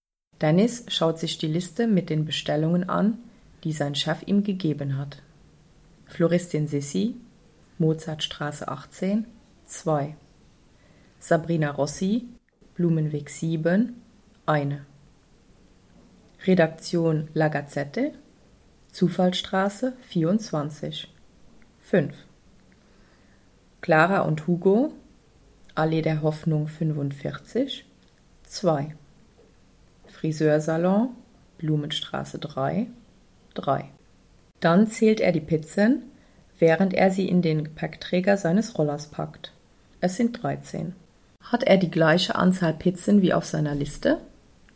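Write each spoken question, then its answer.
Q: Hat er die gleiche Anzahl Pizzen wie auf seiner Liste?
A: Ja (2+1+5+2+3 = 13)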